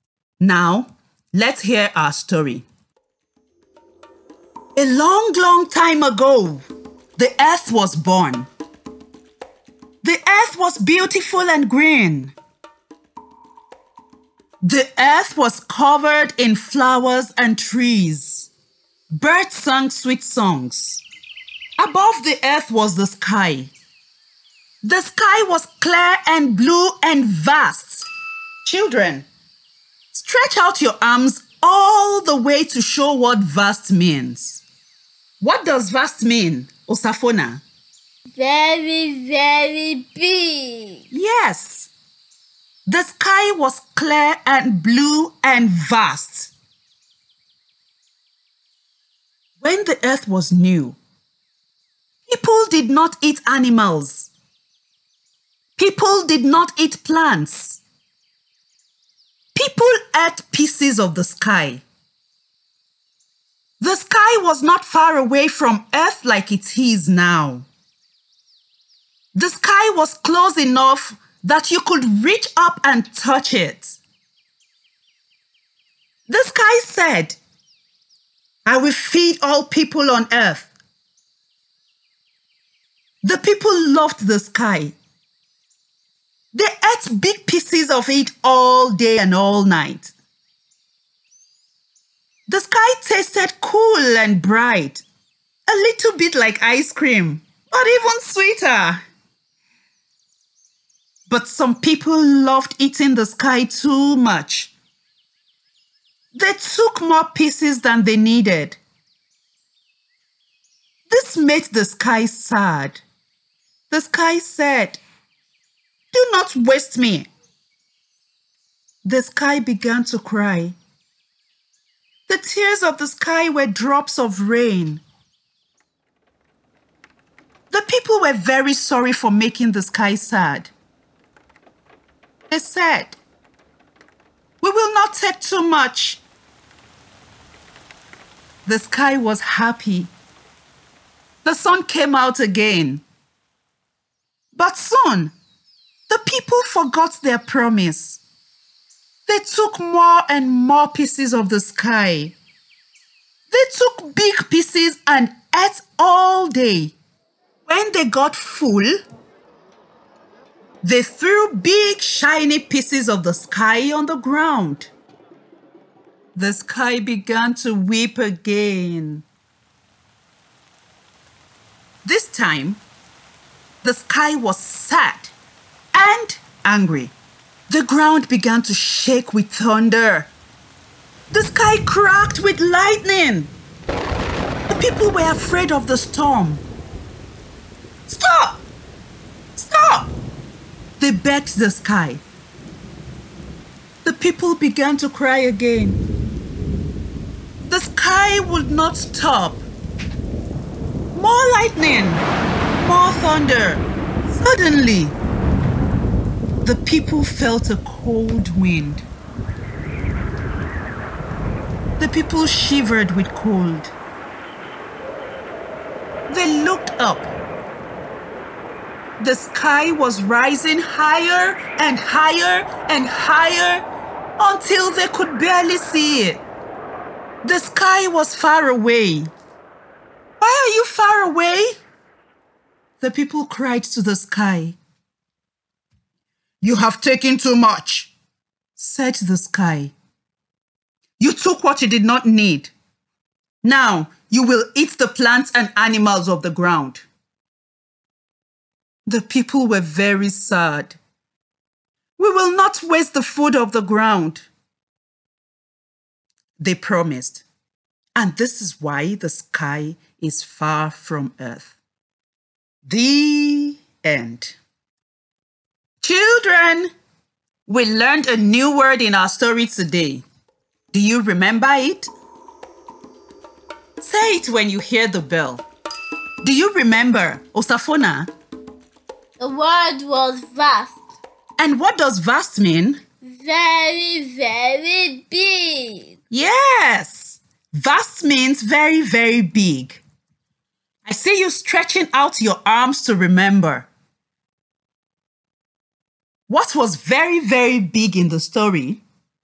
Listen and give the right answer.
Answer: The sky.